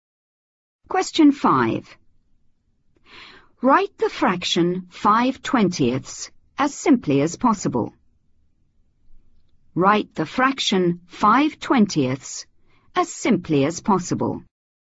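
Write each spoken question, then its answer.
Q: Write the fraction 5/20 as simply as possible.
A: 1/4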